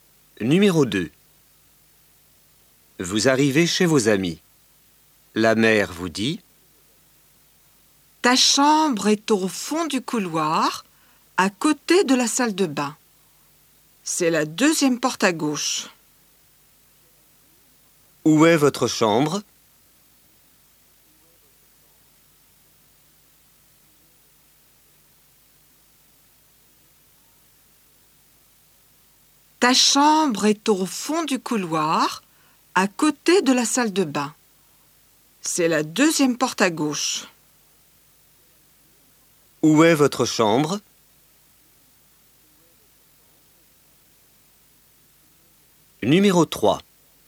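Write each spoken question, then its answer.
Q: Où est votre chambre?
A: Au fond du couloir, à côté de la salle de bain, deuxième porte à gauche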